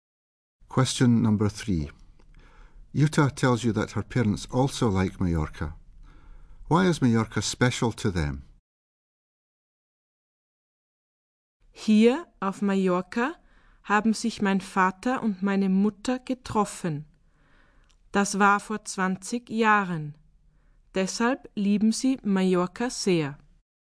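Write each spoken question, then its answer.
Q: Why is Mallorca special to them?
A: Her father and mother met there 20 years ago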